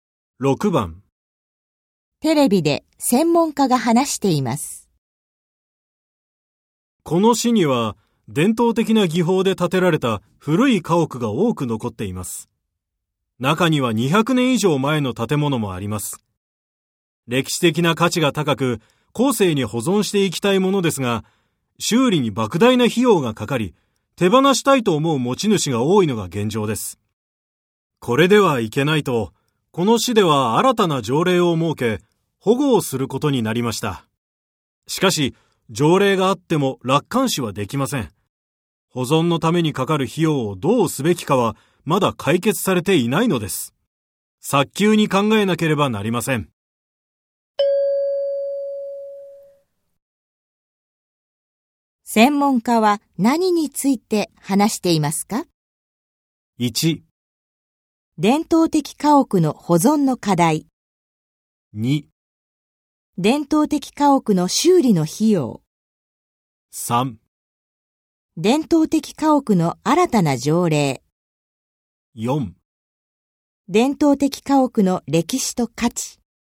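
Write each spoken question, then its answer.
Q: 専門家は何について話していますか?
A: 1: 伝統的家屋の保存の課題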